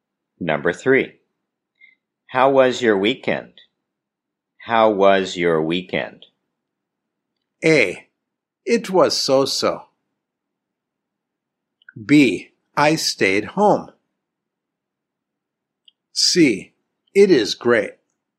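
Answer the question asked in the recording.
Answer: A: It was so-so.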